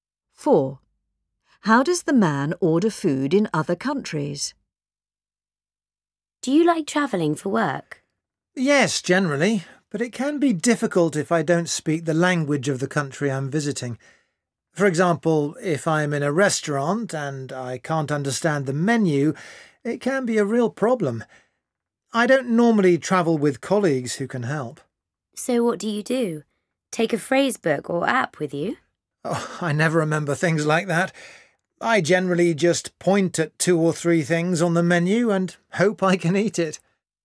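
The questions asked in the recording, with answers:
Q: How does the man order food in other countries?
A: He points at things on the menu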